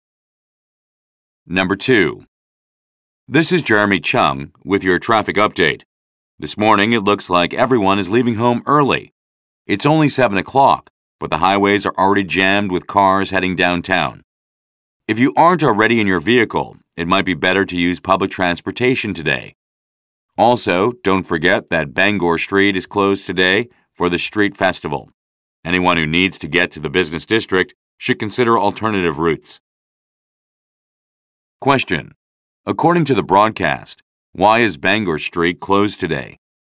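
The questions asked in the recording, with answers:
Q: According to the broadcast, why is Bangor Street closed today?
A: Because of the street festival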